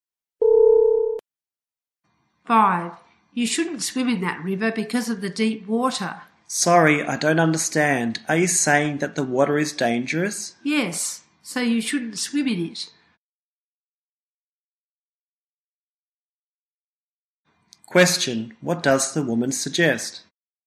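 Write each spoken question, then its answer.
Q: What does the woman suggest?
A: Not to swim in the river because the water is deep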